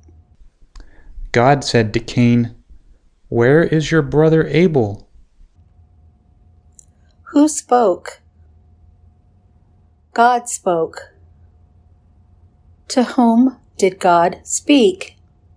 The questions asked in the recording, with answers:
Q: Who spoke?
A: God spoke.